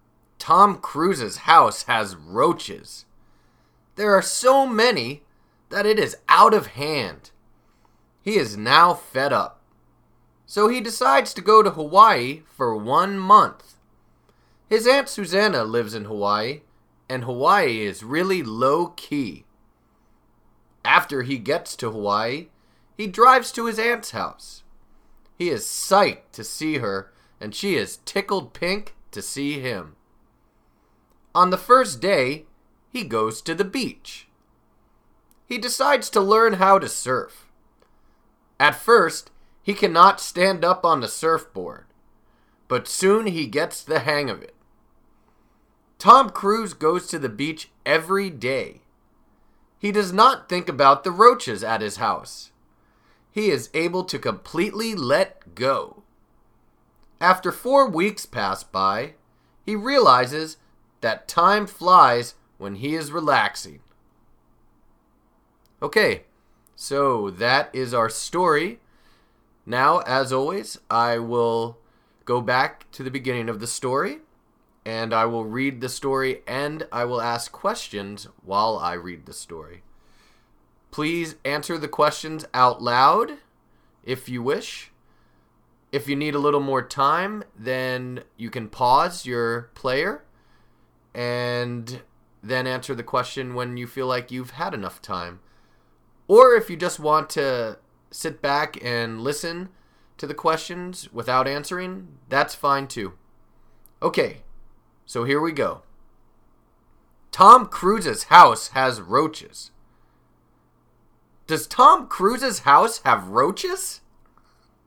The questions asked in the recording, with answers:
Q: Does Tom Cruise's house have roaches?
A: Yes. Yes, it does. Tom Cruise's house has roaches.